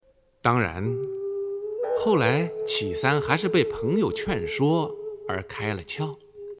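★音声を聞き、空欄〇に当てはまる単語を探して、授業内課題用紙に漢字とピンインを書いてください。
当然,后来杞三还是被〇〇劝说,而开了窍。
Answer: 朋友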